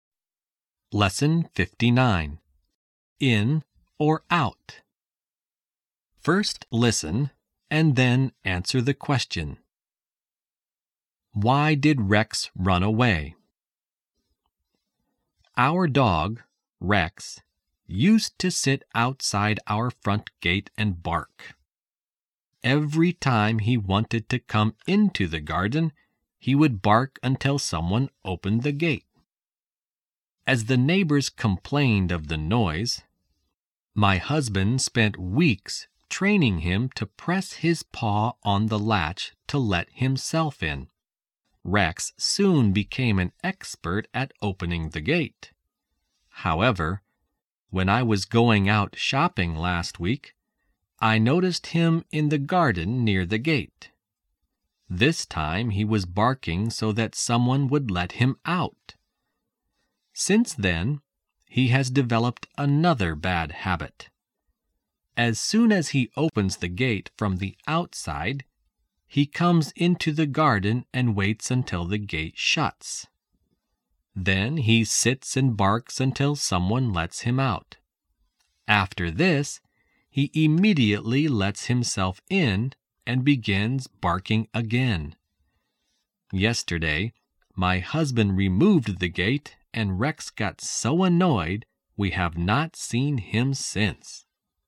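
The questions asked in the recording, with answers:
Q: Why did Rex run away?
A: Because the husband removed the gate and Rex got annoyed.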